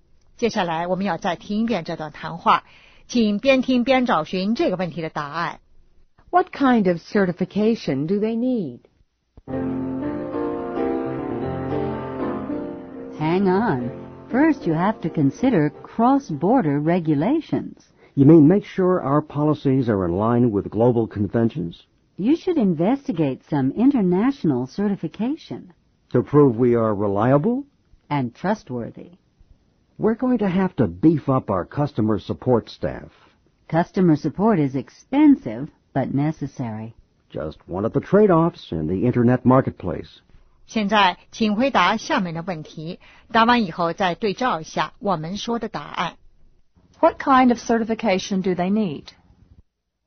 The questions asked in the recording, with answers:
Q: What kind of certification do they need?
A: International certification.